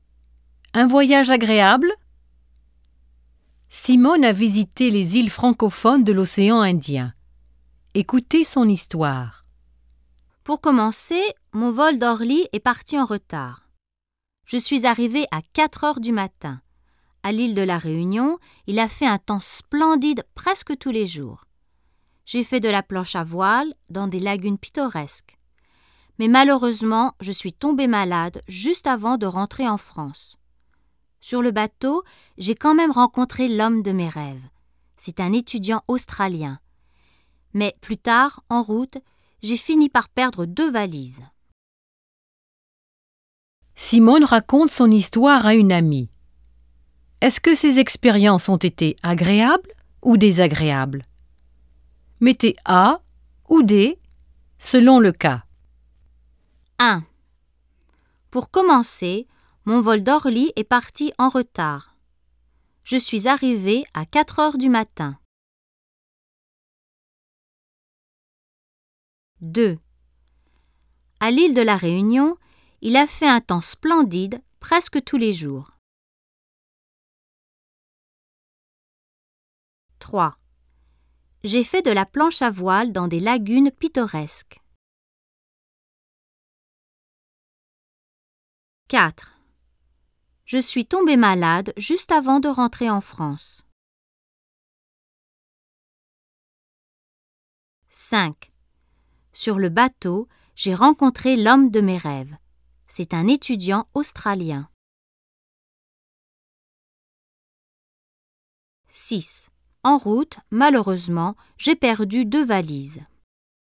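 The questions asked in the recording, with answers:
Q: Pour commencer, mon vol d'Orly est parti en retard.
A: D: désagréable

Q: À l'île de la Réunion, il a fait un temps splendide presque tous les jours.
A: A: agréable

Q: J'ai fait de la planche à voile dans des lagunes pittoresques.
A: A: agréable

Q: Je suis tombée malade juste avant de rentrer en France.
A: D: désagréable

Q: Sur le bateau, j'ai rencontré l'homme de mes rêves.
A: A: agréable

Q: En route, malheureusement, j'ai perdu 2 valises.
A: D: désagréable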